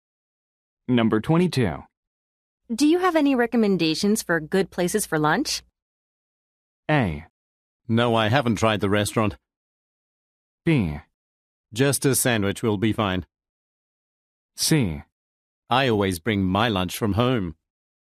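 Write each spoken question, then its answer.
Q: Do you have any recommendations for good places for lunch?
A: C: I always bring my lunch from home.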